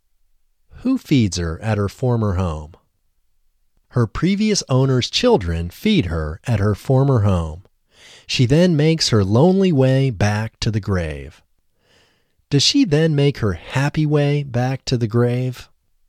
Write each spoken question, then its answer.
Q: Does she then make her happy way back to the grave?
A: No, she doesn't make her happy way back to the grave.